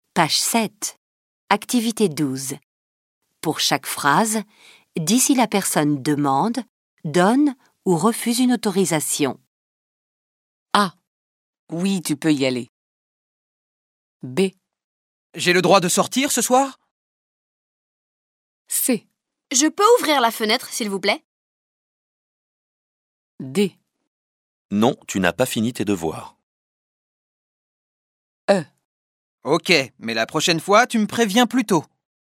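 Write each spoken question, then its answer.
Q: Oui, tu peux y aller.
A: donne une autorisation

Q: J'ai le droit de sortir ce soir ?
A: demande une autorisation

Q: Je peux ouvrir la fenêtre, s'il vous plaît ?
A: demande une autorisation

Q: Non, tu n'as pas fini tes devoirs.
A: refuse une autorisation

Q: Ok, mais la prochaine fois, tu me préviens plus tôt.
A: donne une autorisation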